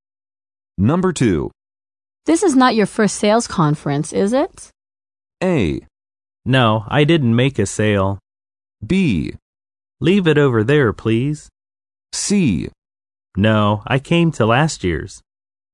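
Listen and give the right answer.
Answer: C: No, I came to last year's.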